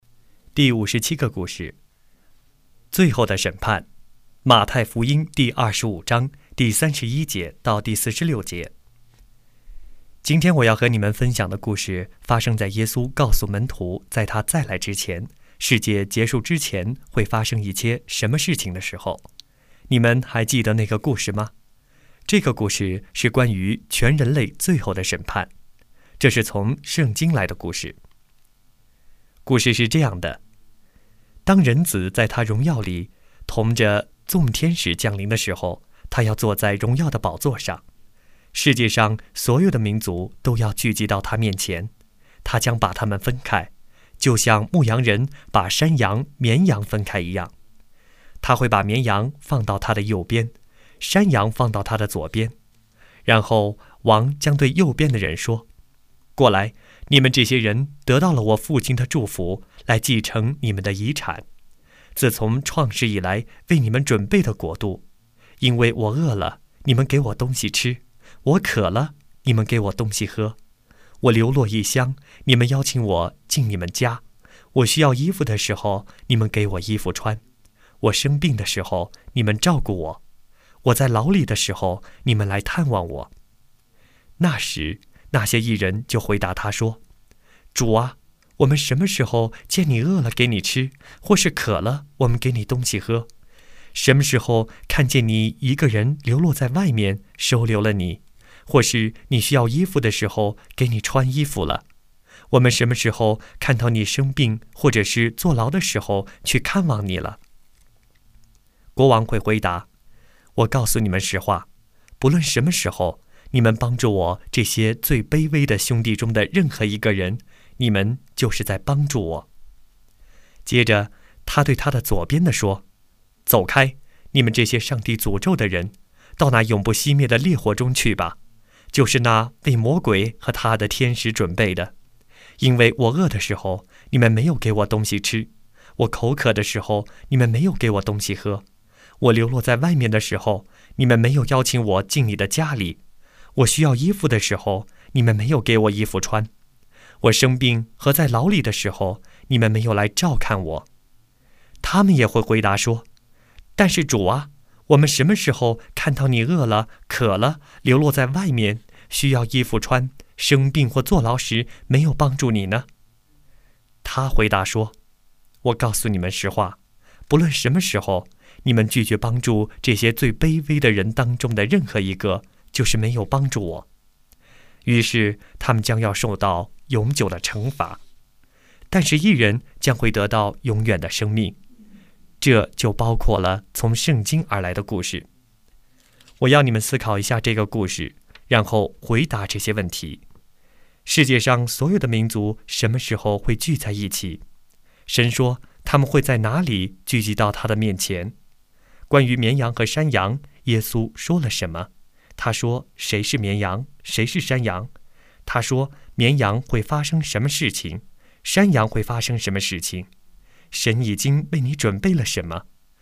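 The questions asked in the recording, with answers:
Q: 世界上所有的民族什么时候会聚在一起?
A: 人子在他荣耀里同着众天使降临、坐在荣耀的宝座上的时候

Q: 关于绵羊和山羊,耶稣说了什么?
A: 他会像牧羊人一样把他们分开,绵羊在右边,山羊在左边

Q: 他说谁是绵羊,谁是山羊?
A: 绵羊是帮助最卑微的人的义人,山羊是拒绝帮助他们的人

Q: 他说绵羊会发生什么事情,山羊会发生什么事情?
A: 绵羊得到永远的生命、继承国度;山羊受到永久的惩罚,进入永不熄灭的烈火

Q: 神已经为你准备了什么?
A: 自从创世以来为你们准备的国度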